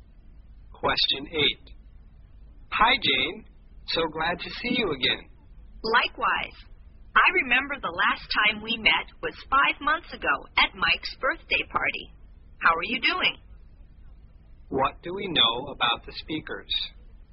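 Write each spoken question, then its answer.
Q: What do we know about the speakers?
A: They last met 5 months ago at Mike's birthday party.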